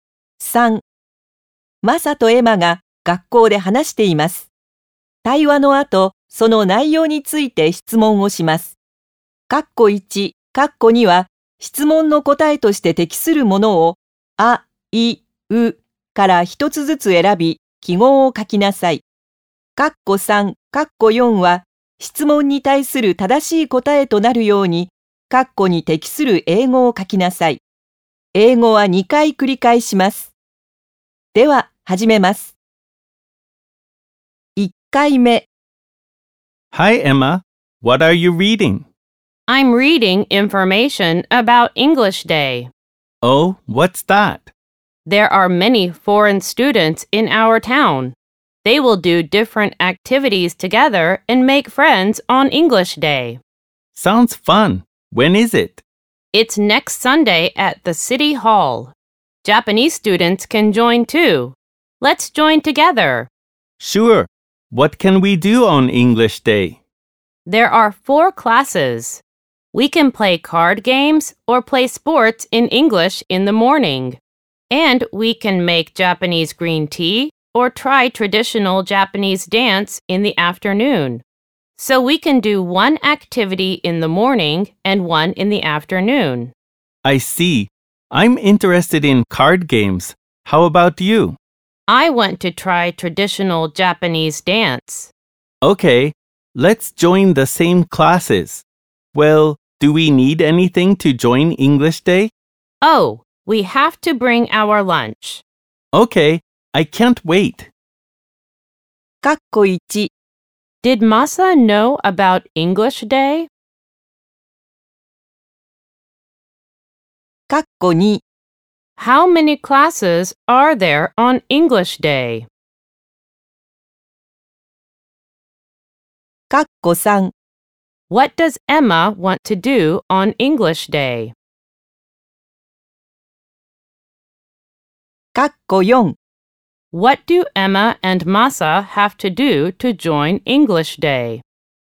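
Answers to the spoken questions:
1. No, he didn't
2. Four
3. Try traditional Japanese dance
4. Bring their lunch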